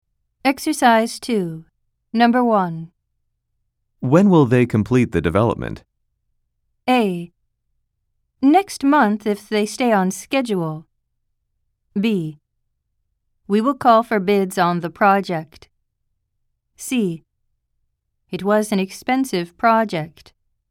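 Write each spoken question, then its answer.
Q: When will they complete the development?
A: A: Next month if they stay on schedule.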